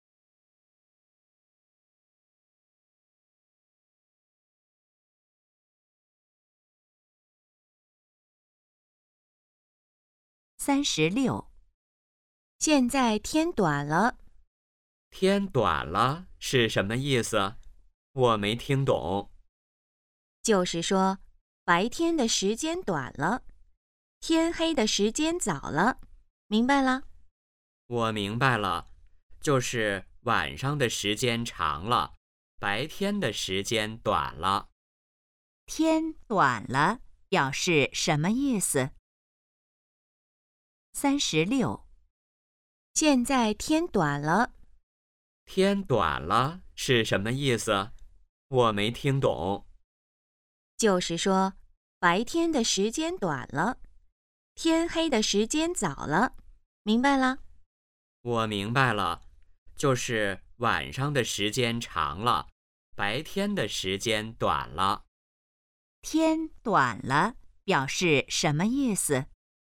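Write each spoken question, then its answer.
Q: 天短了表示什么意思?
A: 白天的时间短了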